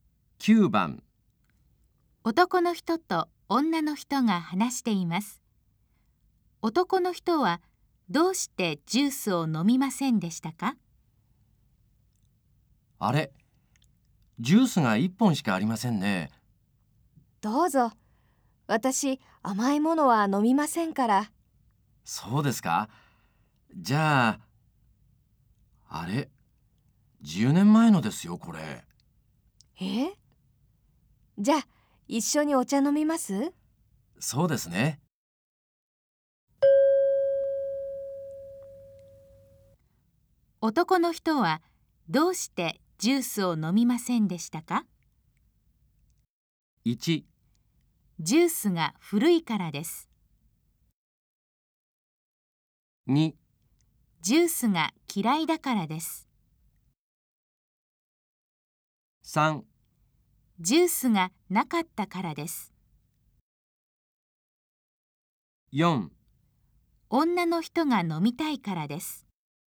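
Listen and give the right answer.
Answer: 1: ジュースが古いからです。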